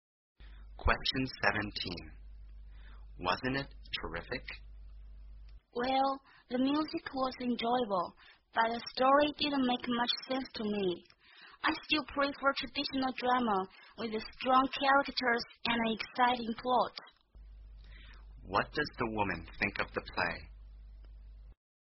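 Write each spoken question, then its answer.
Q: What does the woman think of the play?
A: The music was enjoyable but the story didn't make much sense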